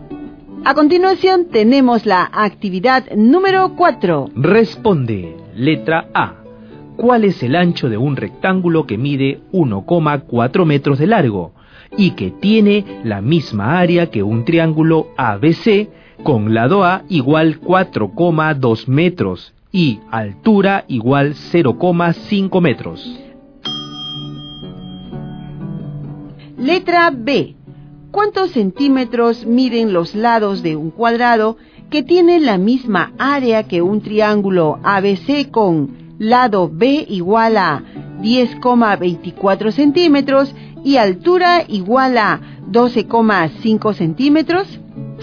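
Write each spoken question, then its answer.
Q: ¿Cuál es el ancho de un rectángulo que mide 1,4 metros de largo y que tiene la misma área que un triángulo ABC con lado A igual 4,2 metros y altura igual 0,5 metros?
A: 0,75 metros

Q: ¿Cuántos centímetros miden los lados de un cuadrado que tiene la misma área que un triángulo ABC con lado B igual a 10,24 centímetros y altura igual a 12,5 centímetros?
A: 8 centímetros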